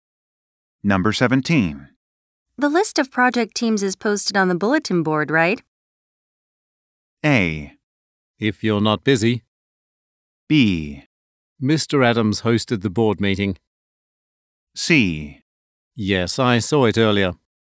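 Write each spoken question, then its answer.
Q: The list of project teams is posted on the bulletin board, right?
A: C: Yes, I saw it earlier.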